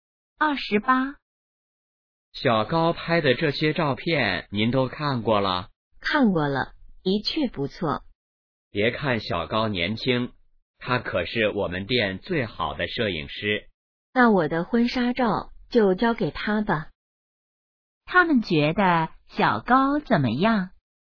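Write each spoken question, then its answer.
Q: 他们觉得小高怎么样?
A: 照片拍得好,是最好的摄影师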